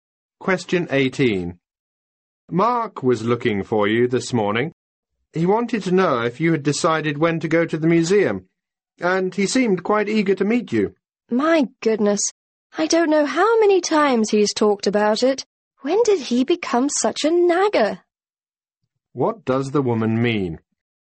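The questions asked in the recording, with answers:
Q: What does the woman mean?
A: She is annoyed that Mark keeps asking about the museum visit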